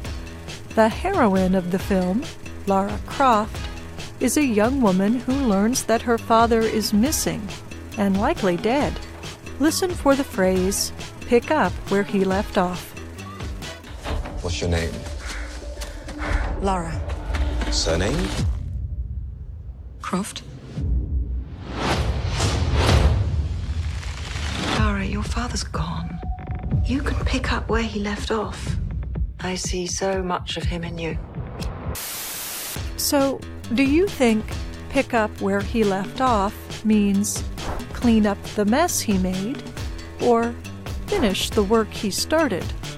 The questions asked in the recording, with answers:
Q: So, do you think pick up where he left off means clean up the mess he made or finish the work he started?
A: Pick up where he left off means finish the work he started.